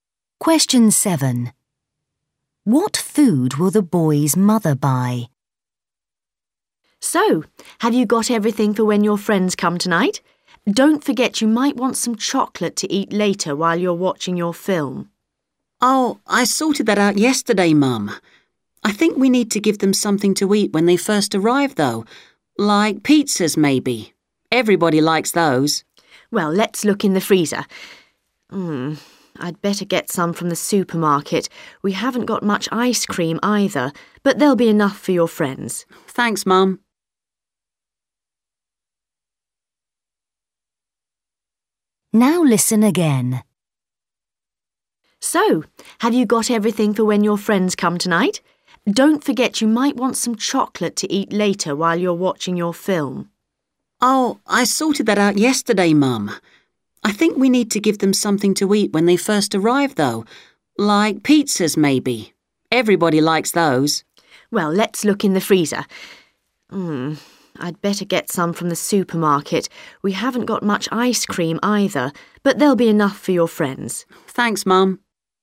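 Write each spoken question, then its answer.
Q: What food will the boy's mother buy?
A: pizzas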